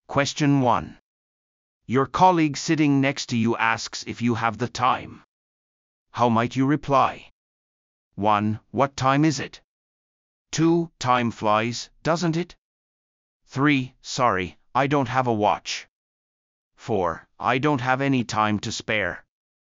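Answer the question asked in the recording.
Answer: 3: Sorry, I don't have a watch.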